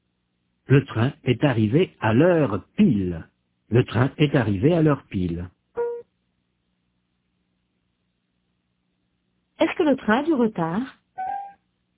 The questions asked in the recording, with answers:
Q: Est-ce que le train a du retard ?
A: Non, il est arrivé à l'heure pile.